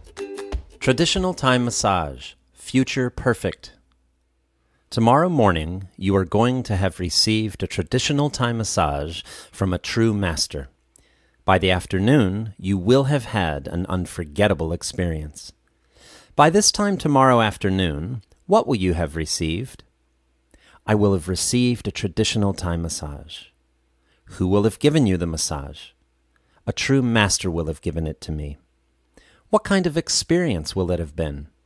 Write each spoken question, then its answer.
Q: What kind of experience will it have been?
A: It will have been an unforgettable experience.